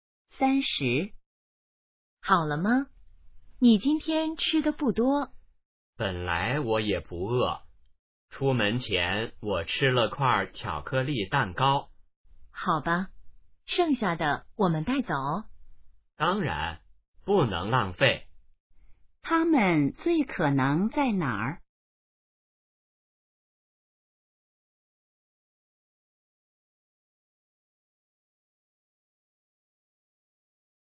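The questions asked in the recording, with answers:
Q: 他们最可能在哪儿?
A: 饭馆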